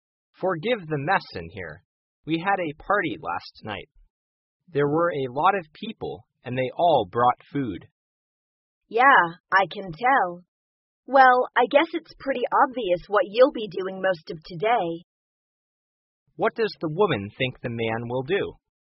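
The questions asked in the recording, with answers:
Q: What does the woman think the man will do?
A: Clean up the mess from the party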